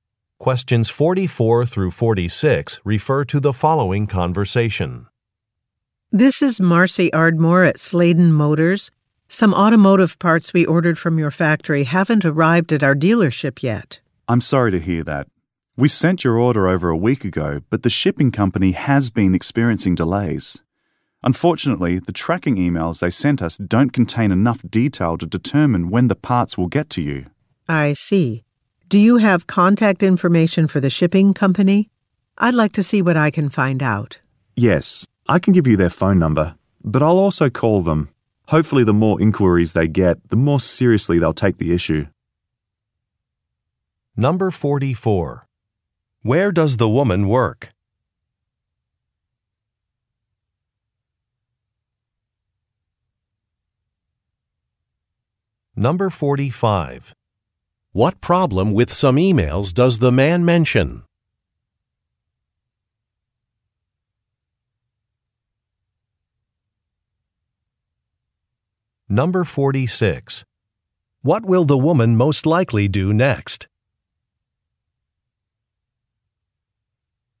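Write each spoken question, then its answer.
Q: Where does the woman work?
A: At a car dealership

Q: What problem with some emails does the man mention?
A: They don't contain enough detail

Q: What will the woman most likely do next?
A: Call the shipping company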